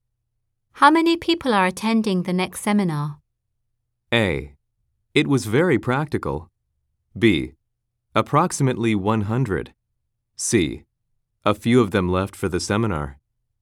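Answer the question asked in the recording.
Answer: B: Approximately 100.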